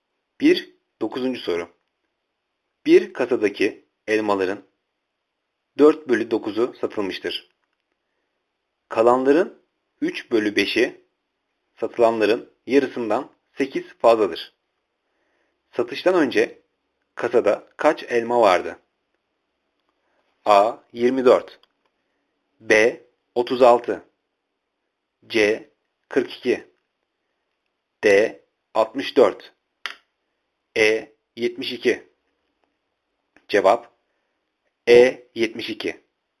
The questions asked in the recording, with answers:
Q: Satıştan önce kasada kaç elma vardı?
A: Cevap E. 72